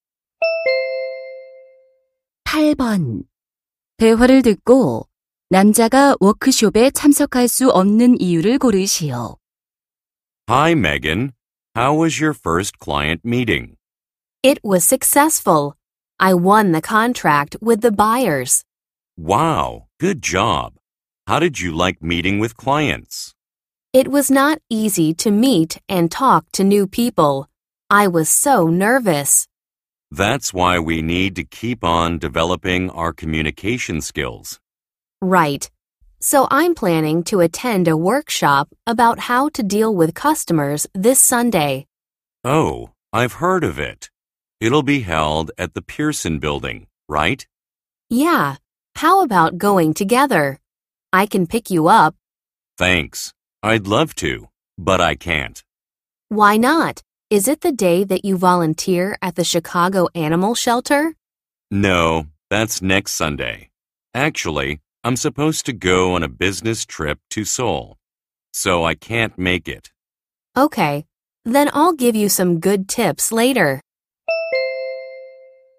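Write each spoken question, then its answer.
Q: 대화를 듣고 남자가 워크숍에 참석할 수 없는 이유를 고르시오.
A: 서울로 출장을 가야 해서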